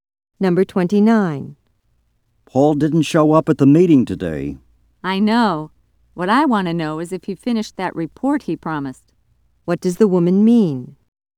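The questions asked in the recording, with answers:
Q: What does the woman mean?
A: She wonders whether Paul finished the report he promised.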